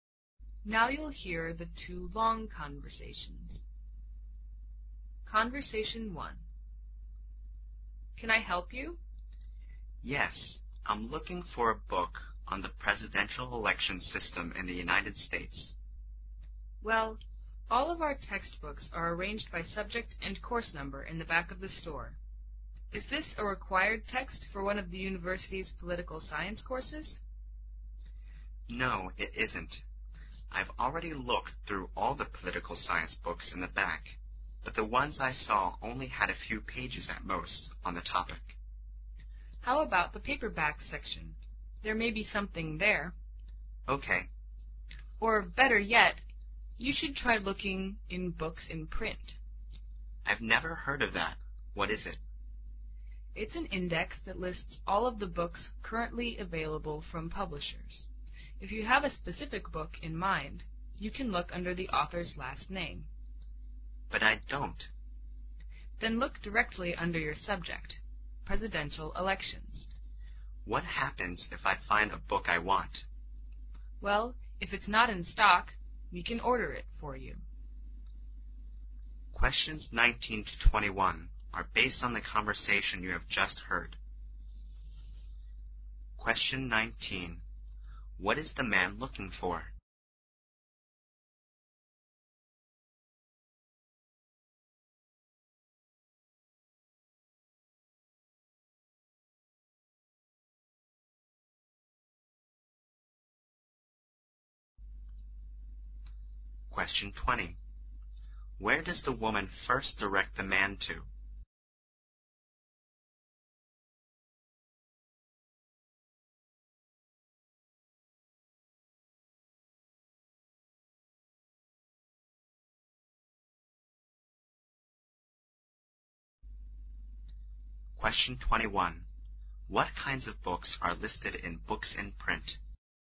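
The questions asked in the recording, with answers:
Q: What is the man looking for?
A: A book on the presidential election system in the United States.

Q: Where does the woman first direct the man to?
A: The textbooks in the back of the store.

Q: What kinds of books are listed in books in print?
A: All books currently available from publishers.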